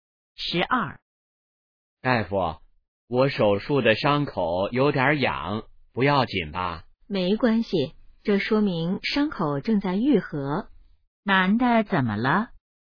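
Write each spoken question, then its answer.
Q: 男的怎么了?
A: 手术伤口有点痒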